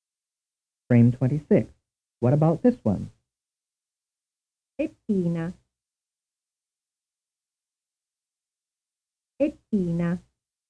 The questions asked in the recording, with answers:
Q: What about this one?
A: The answer is a statement.